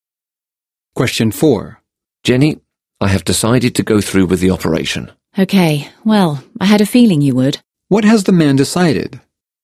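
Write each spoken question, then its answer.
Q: What has the man decided?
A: To have the operation.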